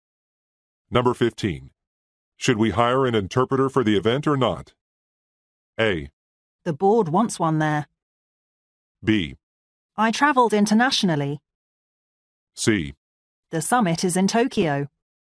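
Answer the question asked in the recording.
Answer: A: The board wants one there.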